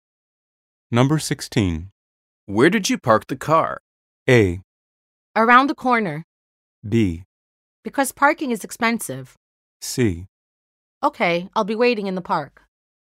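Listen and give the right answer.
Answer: A: Around the corner.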